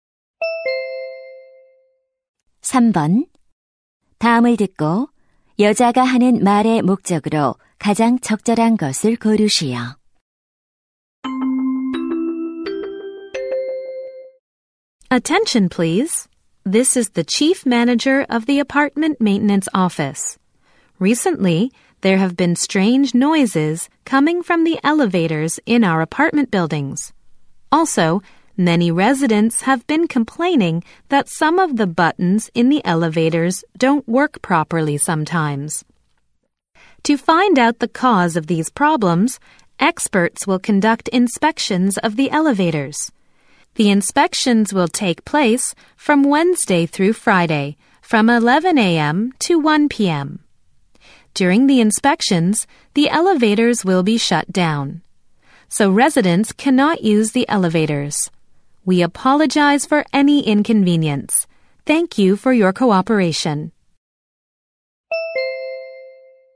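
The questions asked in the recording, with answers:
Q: 다음을 듣고 여자가 하는 말의 목적으로 가장 적절한 것을 고르시오.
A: 엘리베이터 점검 일정과 운행 중단을 안내하려고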